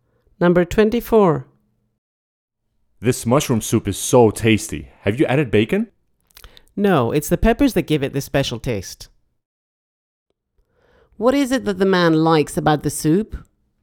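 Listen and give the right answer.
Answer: The peppers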